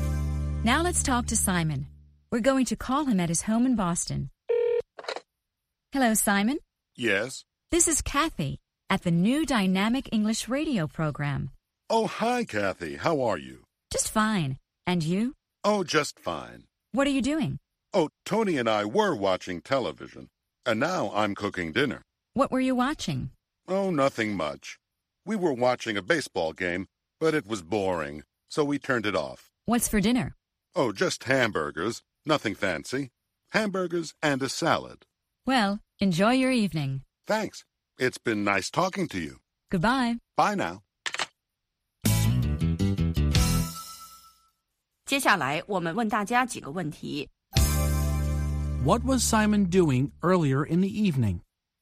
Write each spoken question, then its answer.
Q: What was Simon doing earlier in the evening?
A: He was watching television.